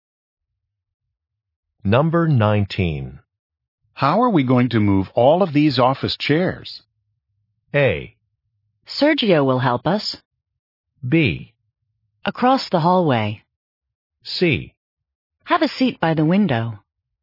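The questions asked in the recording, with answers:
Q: How are we going to move all of these office chairs?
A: A: Sergio will help us.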